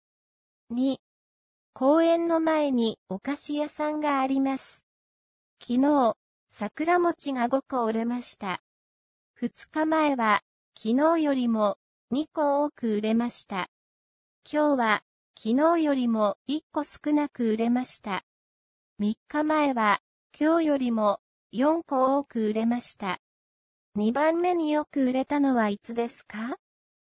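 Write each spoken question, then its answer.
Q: 二番目によく売れたのはいつですか?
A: 二日前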